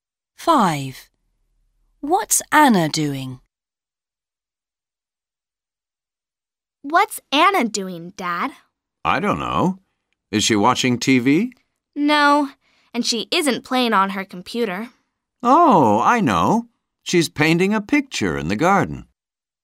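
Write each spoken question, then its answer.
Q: What's Anna doing?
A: Painting a picture in the garden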